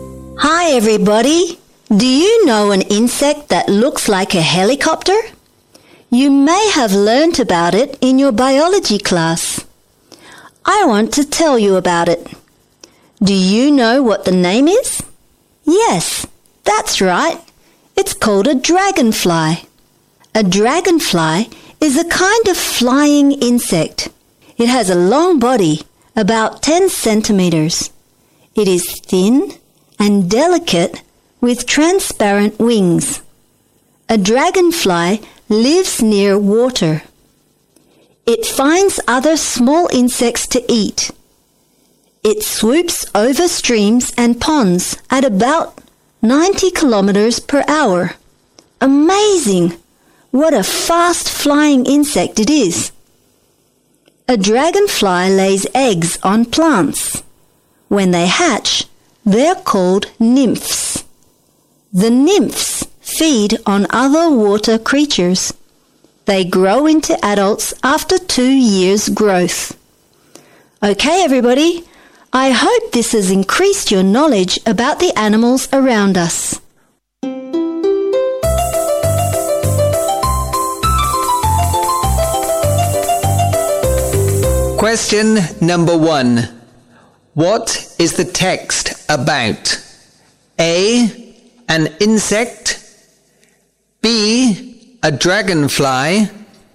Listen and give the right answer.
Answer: B. A dragonfly.